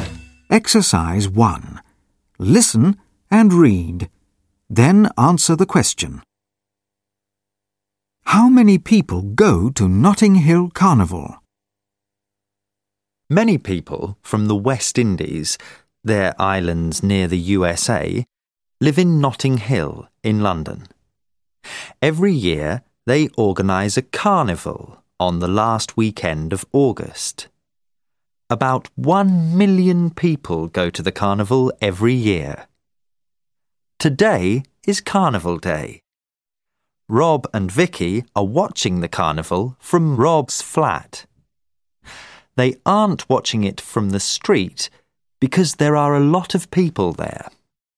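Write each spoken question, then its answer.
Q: How many people go to Notting Hill Carnival?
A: About 1 million people every year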